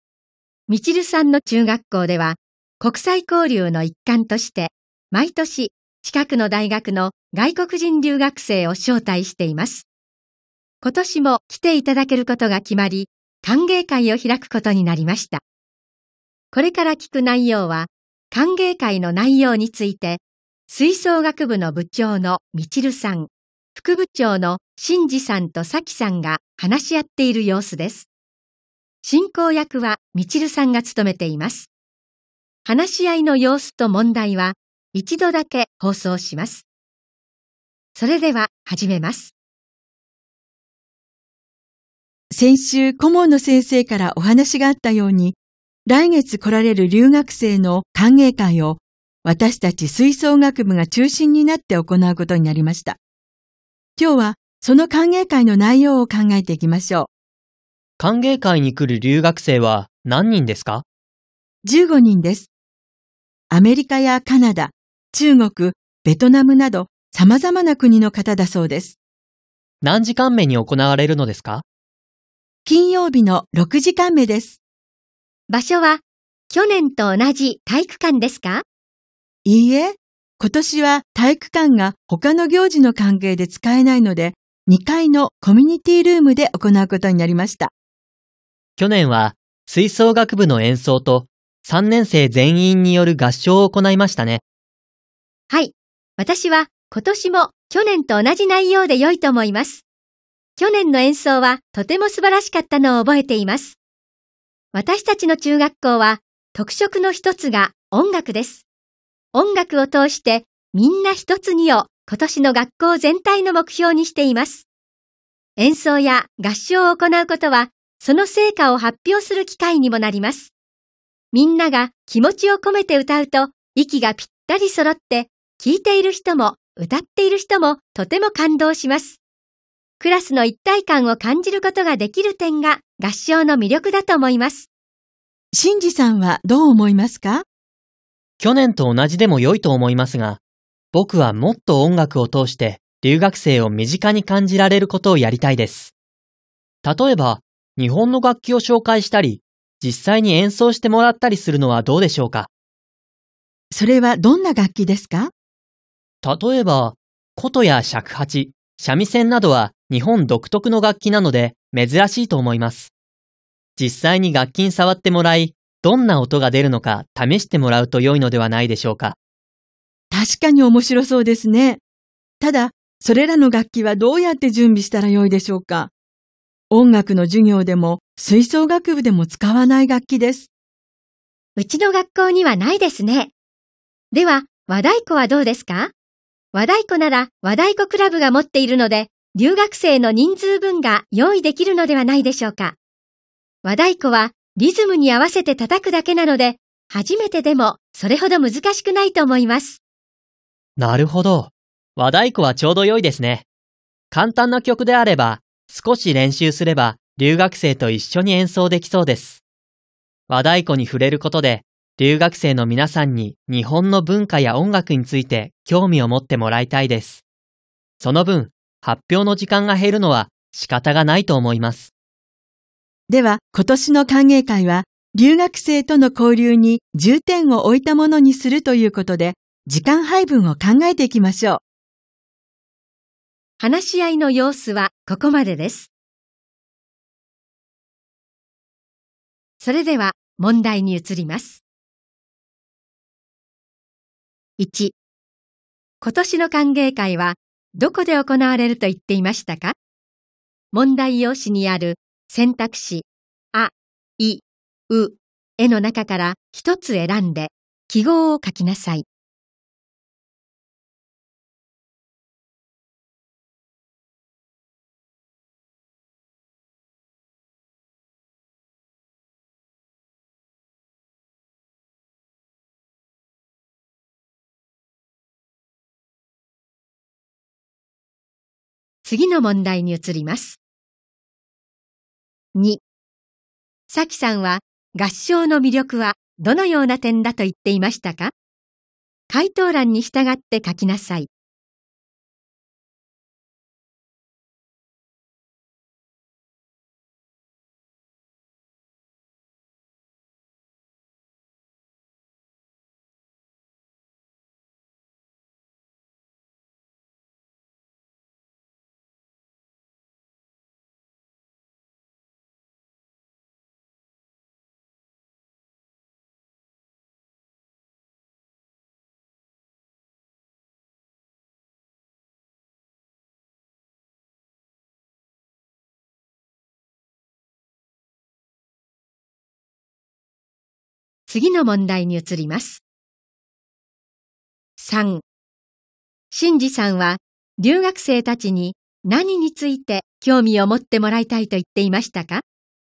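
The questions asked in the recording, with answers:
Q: 今年の歓迎会はどこで行われると言っていましたか?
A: 2階のコミュニティルーム

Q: さきさんは合唱の魅力はどのような点だと言っていましたか?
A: クラスの一体感を感じることができる点

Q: 新次さんは留学生たちに何について興味を持ってもらいたいと言っていましたか?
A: 日本の文化や音楽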